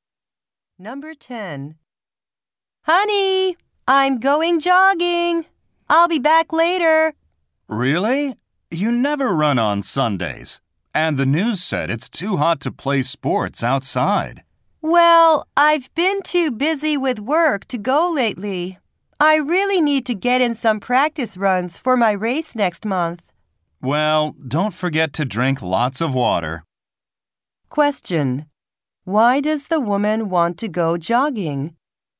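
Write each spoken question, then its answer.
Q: Why does the woman want to go jogging?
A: She wants to get in practice runs for her race next month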